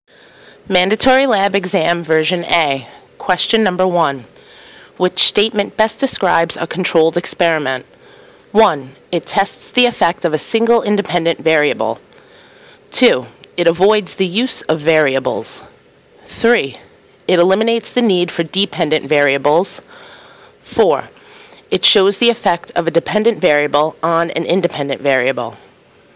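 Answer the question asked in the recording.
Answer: 1: it tests the effect of a single independent variable.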